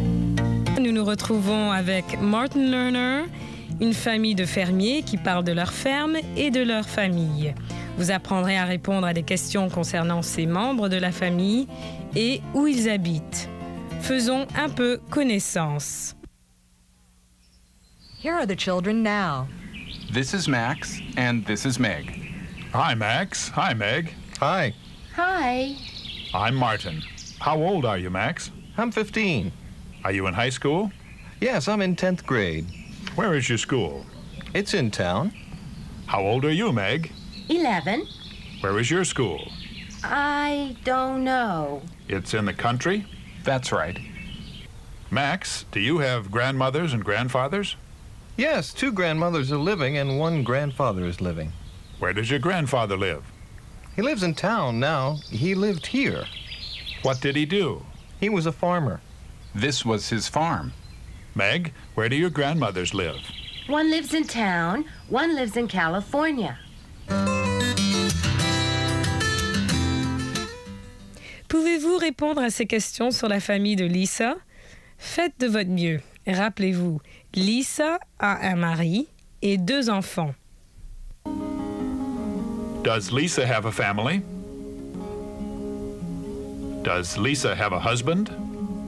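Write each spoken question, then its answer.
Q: Does Lisa have a family?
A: Yes, she does.

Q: Does Lisa have a husband?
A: Yes, she does.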